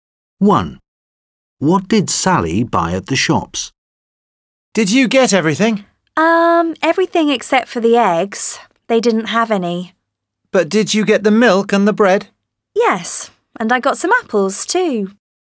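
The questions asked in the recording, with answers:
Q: What did Sally buy at the shops?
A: Milk, bread and apples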